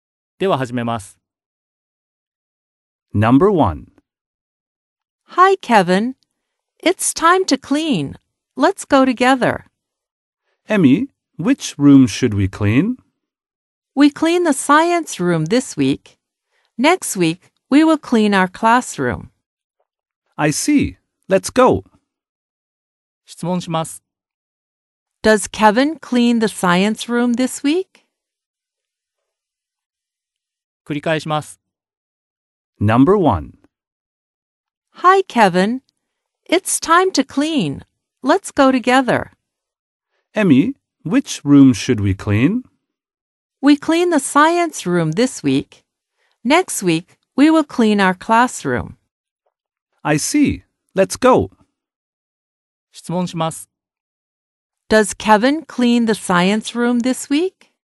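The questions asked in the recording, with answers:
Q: Does Kevin clean the science room this week?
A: Yes, he does.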